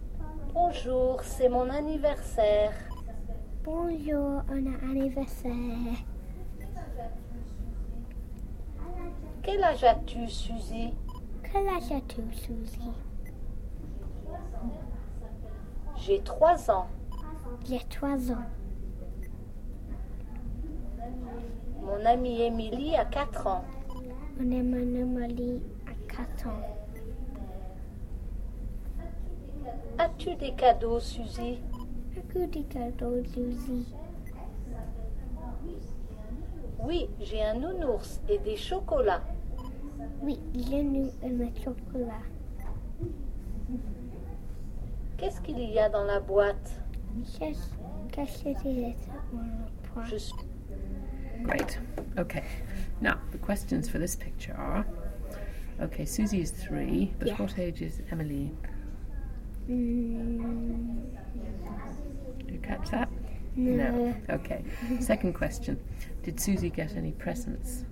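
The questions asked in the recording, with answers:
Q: Did Susie get any presents?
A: Yes, a teddy and chocolates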